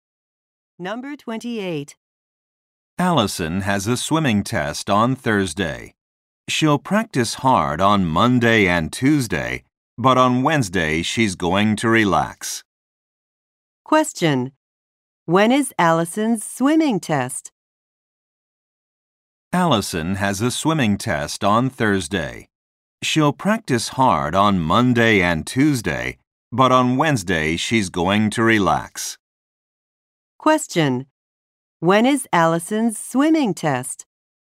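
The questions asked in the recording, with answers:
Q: When is Allison's swimming test?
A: On Thursday.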